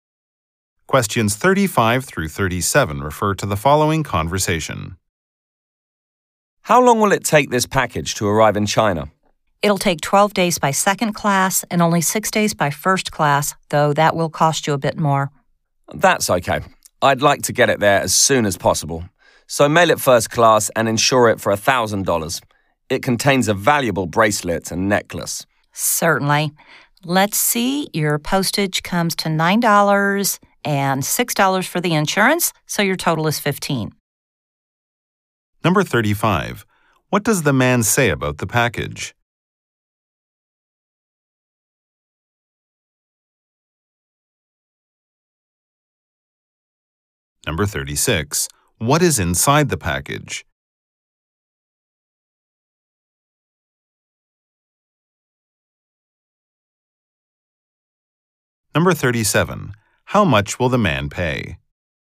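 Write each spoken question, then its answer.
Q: What is inside the package?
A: A bracelet and a necklace

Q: How much will the man pay?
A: $15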